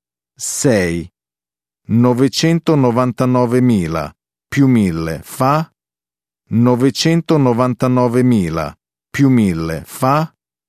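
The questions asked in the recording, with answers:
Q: 999.000 più 1.000 fa?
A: 1.000.000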